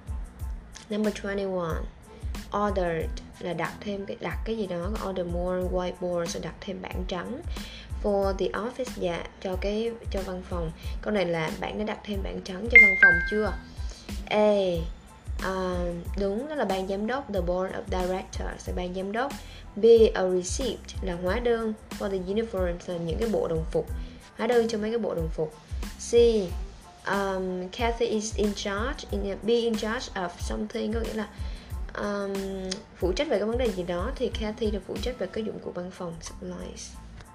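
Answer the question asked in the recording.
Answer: C: Kathy phụ trách dụng cụ văn phòng.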